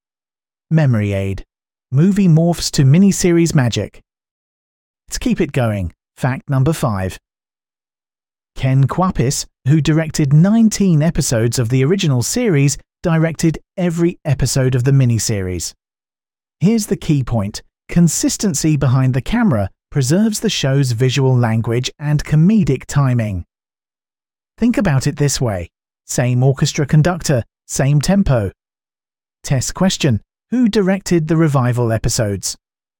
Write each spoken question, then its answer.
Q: Who directed the revival episodes?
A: Correct answer. Ken Kwapis.